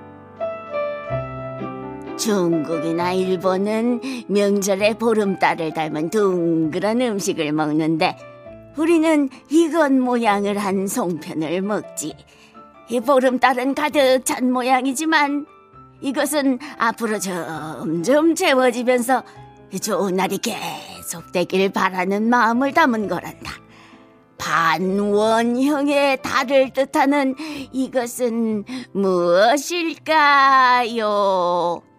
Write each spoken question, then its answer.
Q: 반원형의 달을 뜻하는 이것은 무엇일까요?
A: 반달입니다.